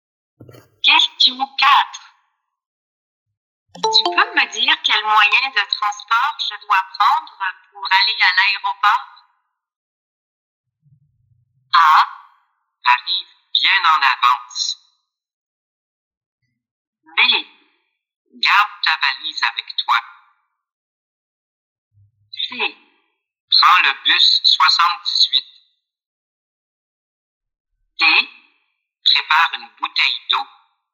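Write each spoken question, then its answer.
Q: Tu peux me dire quel moyen de transport je dois prendre pour aller à l'aéroport?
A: C: Prends le bus 78.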